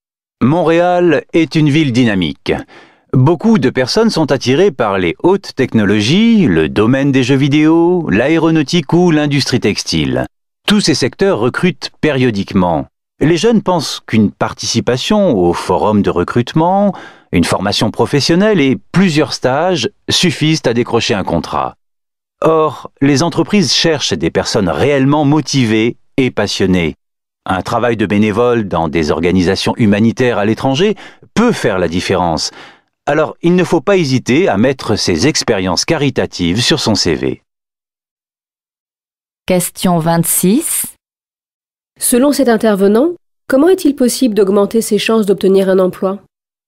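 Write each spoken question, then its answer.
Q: Selon cet intervenant, comment est-il possible d'augmenter ses chances d'obtenir un emploi?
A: En faisant du bénévolat dans des organisations humanitaires à l'étranger et en le mentionnant sur son CV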